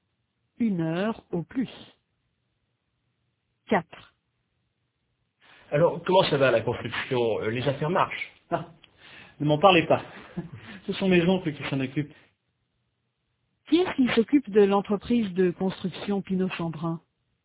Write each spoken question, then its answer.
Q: Qui est-ce qui s'occupe de l'entreprise de construction Pinot-Chambrun?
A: Les oncles d'Hubert.